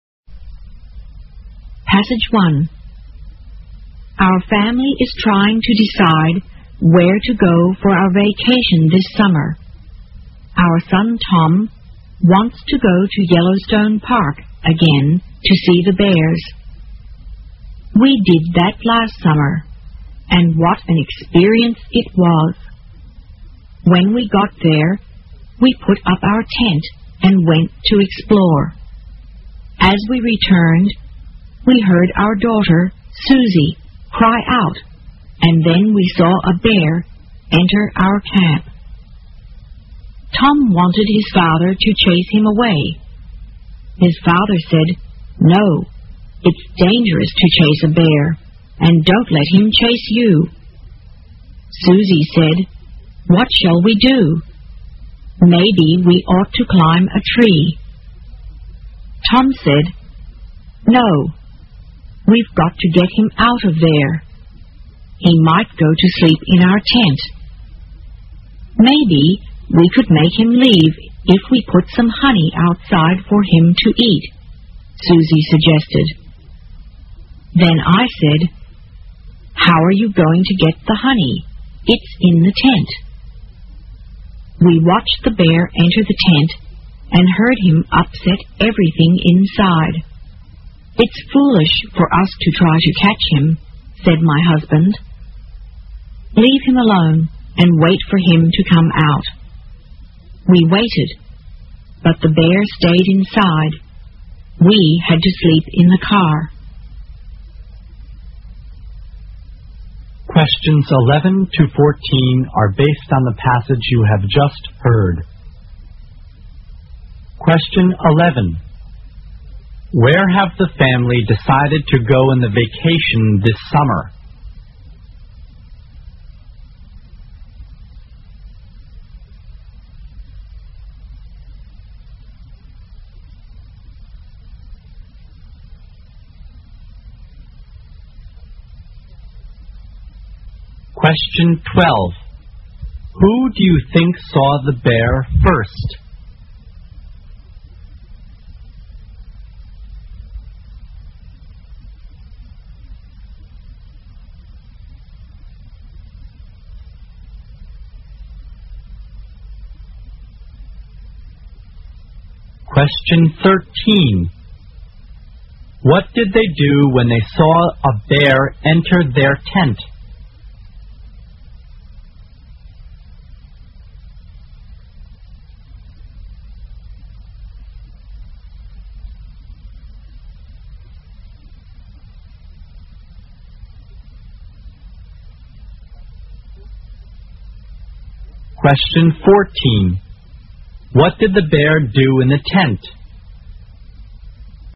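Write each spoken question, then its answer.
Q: Who do you think saw the bear first?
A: Susie

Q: What did they do when they saw a bear enter their tent?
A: They left it alone and waited for it to come out

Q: What did the bear do in the tent?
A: It upset everything inside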